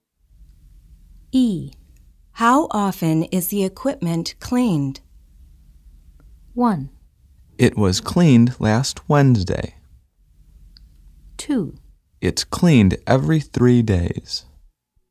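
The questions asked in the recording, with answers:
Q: How often is the equipment cleaned?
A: 2: It's cleaned every 3 days.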